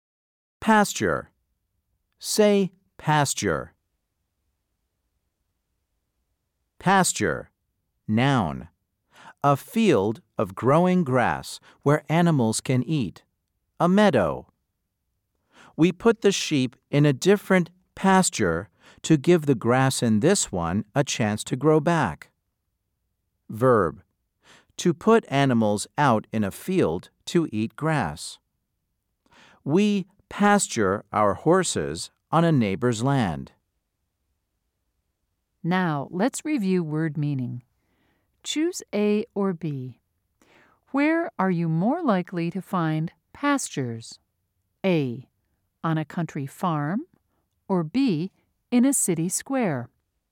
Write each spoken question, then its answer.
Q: Choose A or B. Where are you more likely to find pastures?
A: If you said A, you are correct.